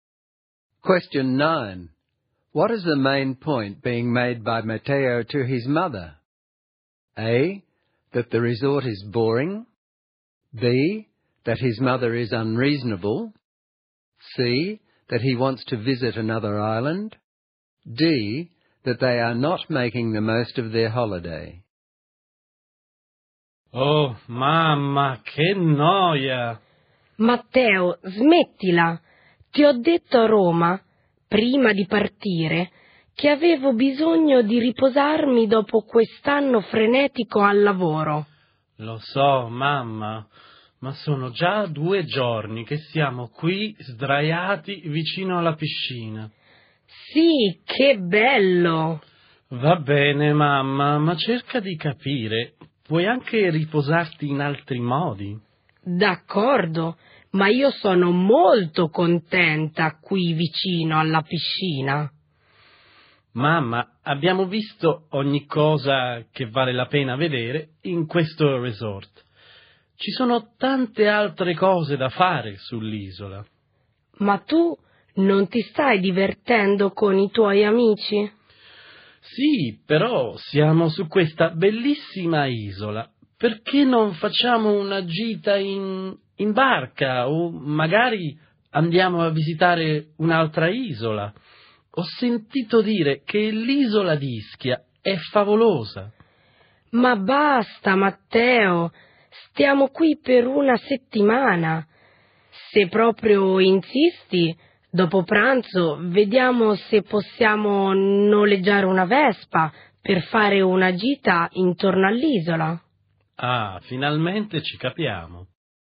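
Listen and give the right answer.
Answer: D: That they are not making the most of their holiday.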